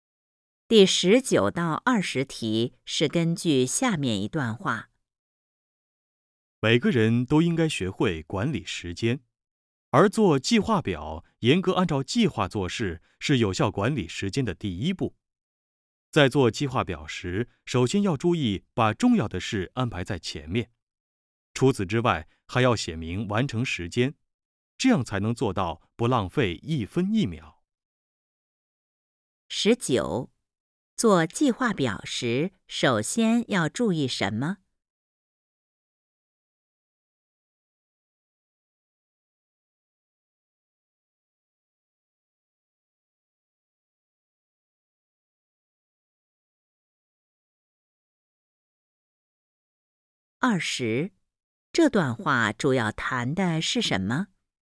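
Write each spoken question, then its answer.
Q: 做计划表时,首先要注意什么?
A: 把重要的事安排在前面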